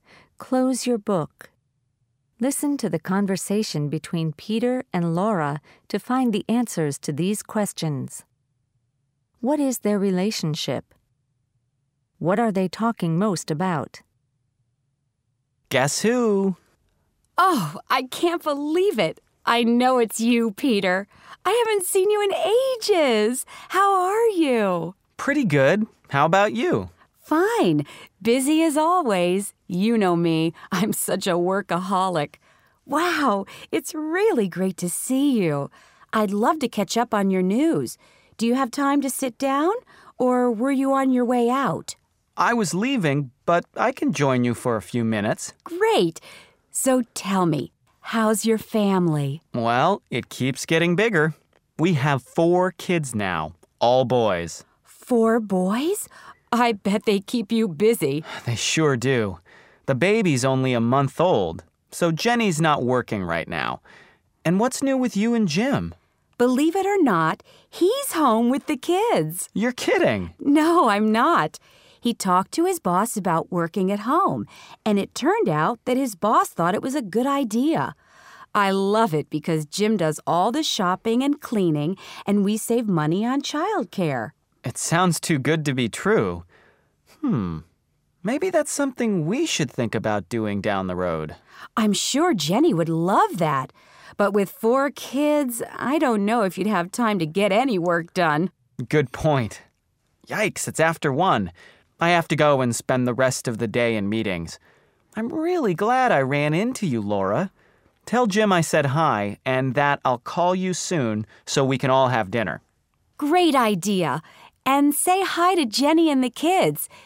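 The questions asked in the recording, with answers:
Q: What are they talking most about?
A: Their families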